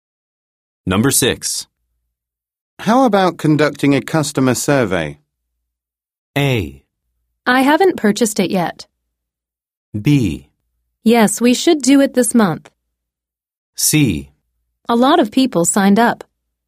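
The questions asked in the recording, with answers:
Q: How about conducting a customer survey?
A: B: Yes, we should do it this month.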